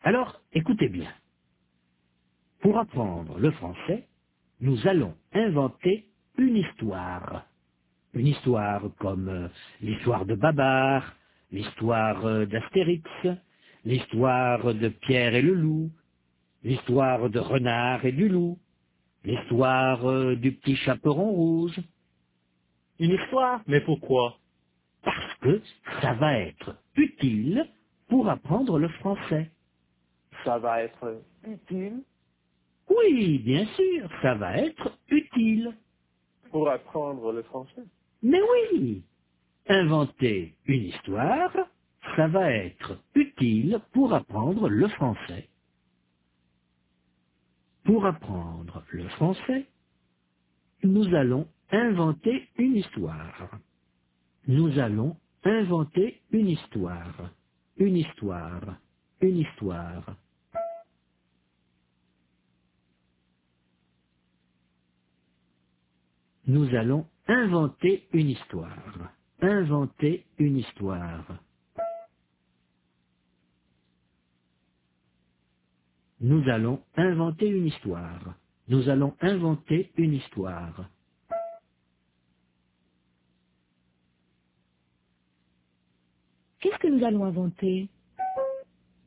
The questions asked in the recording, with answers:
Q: Qu'est-ce que nous allons inventer?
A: Une histoire.